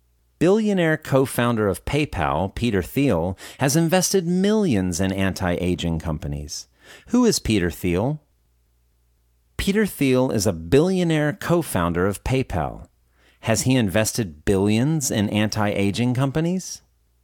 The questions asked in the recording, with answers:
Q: Has he invested billions in anti-aging companies?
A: No, he hasn't invested billions in anti-aging companies.